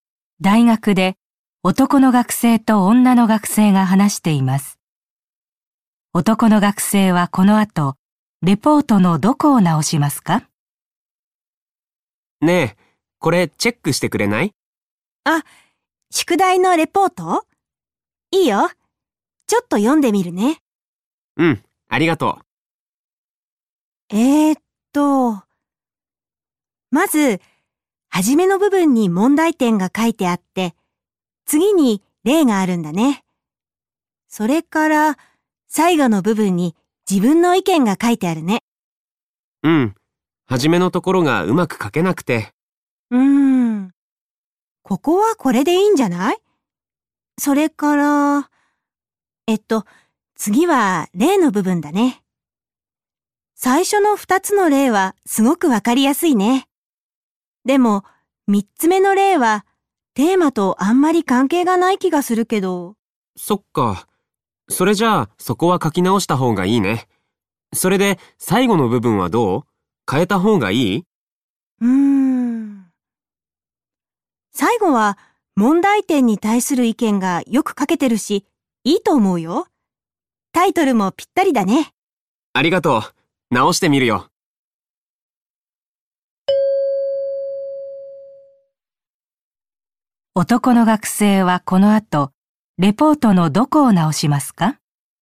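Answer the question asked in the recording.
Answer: 三つ目の例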